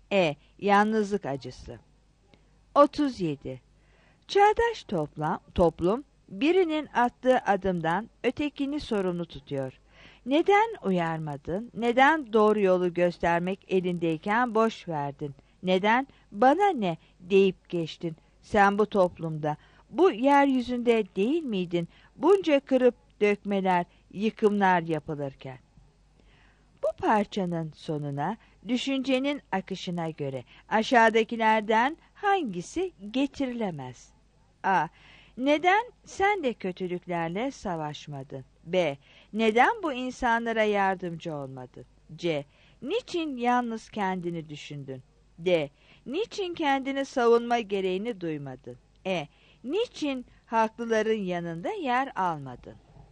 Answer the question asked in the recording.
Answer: 37 D